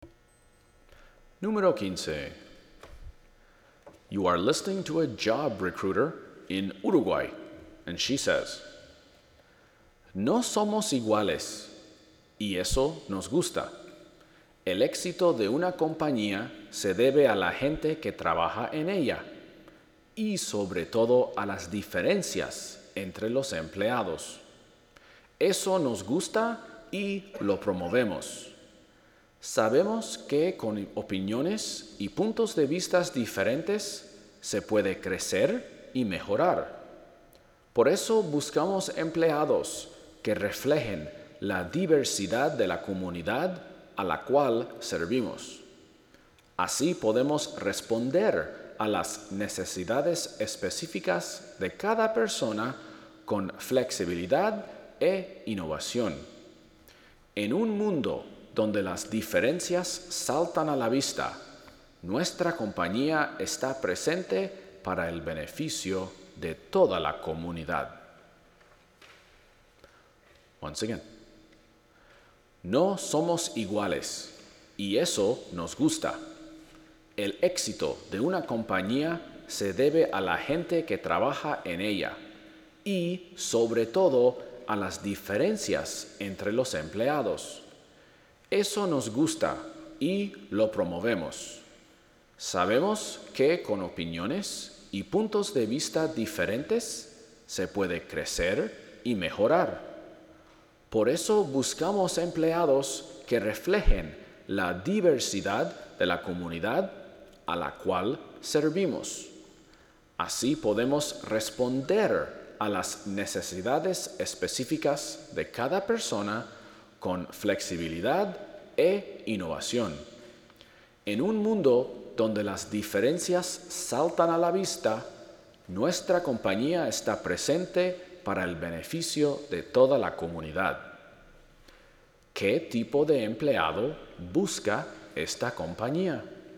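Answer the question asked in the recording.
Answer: Empleados que reflejen la diversidad de la comunidad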